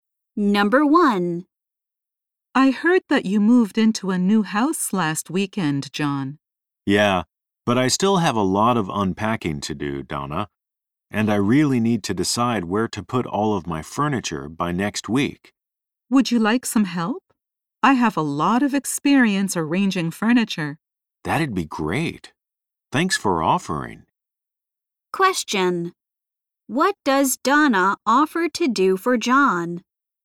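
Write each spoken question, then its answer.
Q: What does Donna offer to do for John?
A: Help him arrange his furniture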